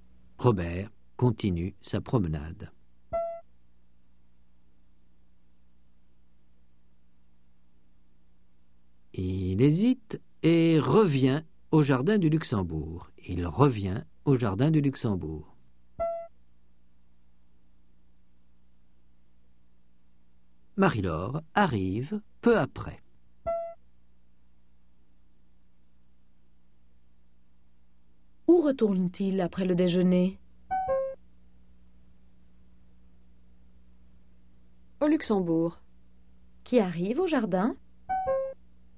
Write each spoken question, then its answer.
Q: Où retourne-t-il après le déjeuner?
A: Au Luxembourg.

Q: Qui arrive au jardin?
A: Marie-Laure.